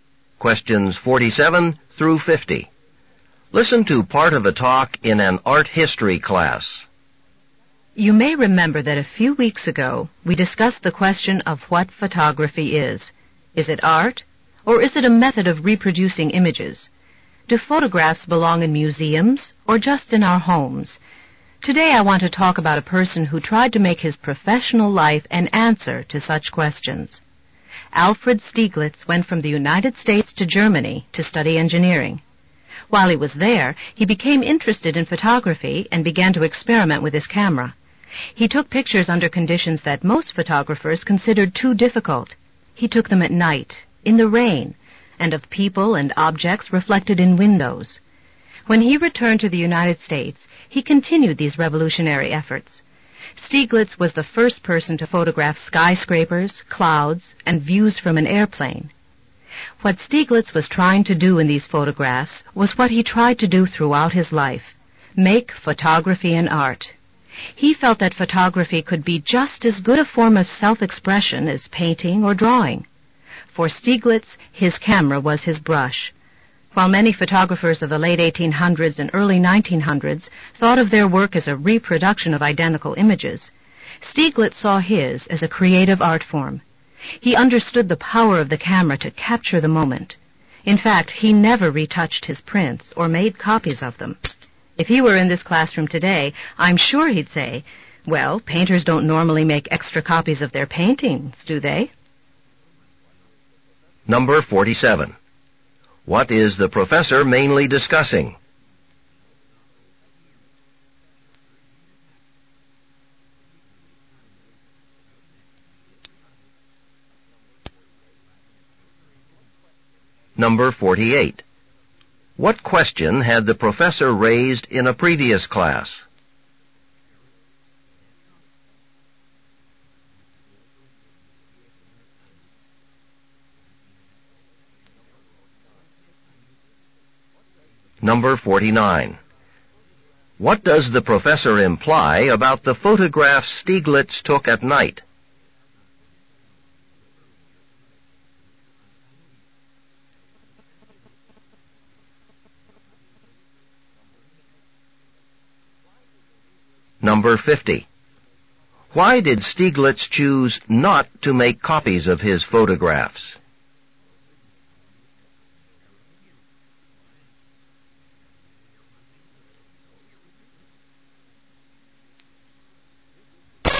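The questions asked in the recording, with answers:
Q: What is the professor mainly discussing?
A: Alfred Stieglitz's efforts to make photography an art

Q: What question had the professor raised in a previous class?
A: Whether photography is art or a method of reproducing images

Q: What does the professor imply about the photographs Stieglitz took at night?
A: They were taken under conditions most photographers considered too difficult

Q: Why did Stieglitz choose not to make copies of his photographs?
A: He saw each photograph as a unique work of art, like a painting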